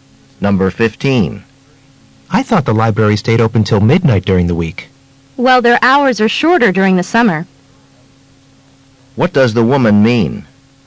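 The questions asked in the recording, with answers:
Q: What does the woman mean?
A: The library closes earlier in summer.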